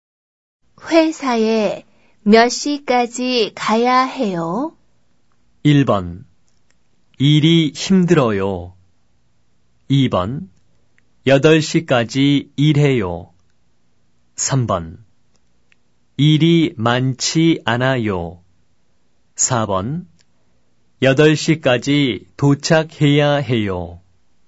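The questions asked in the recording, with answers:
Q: 회사에 몇 시까지 가야 해요?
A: 4: 8시까지 도착해야 해요.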